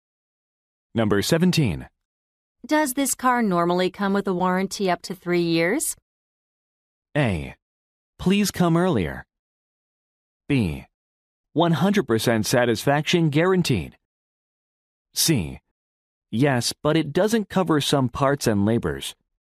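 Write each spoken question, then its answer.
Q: Does this car normally come with a warranty up to 3 years?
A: C: Yes, but it doesn't cover some parts and labors.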